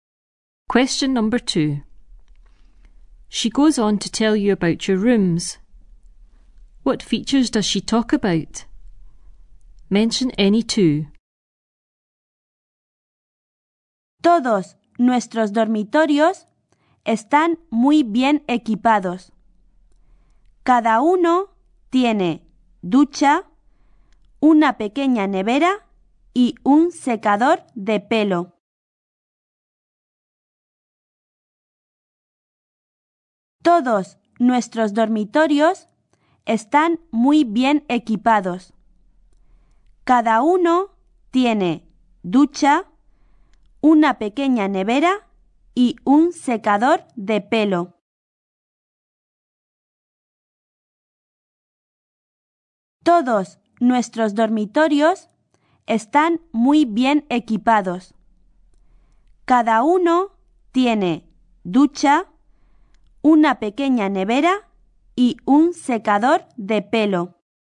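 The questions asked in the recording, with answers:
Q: What features does she talk about?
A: Any two: a shower, a small fridge, a hairdryer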